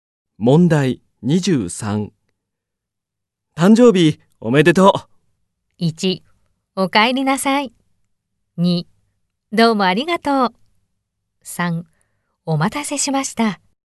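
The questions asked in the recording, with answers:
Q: 誕生日おめでとう。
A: 3: どうもありがとう。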